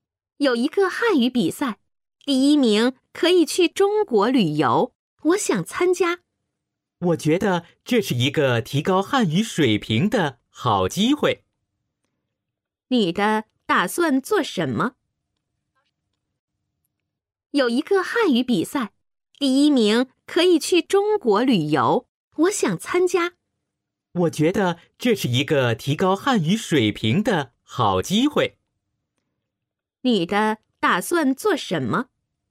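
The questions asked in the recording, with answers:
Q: 你的打算做什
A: 参加汉语比赛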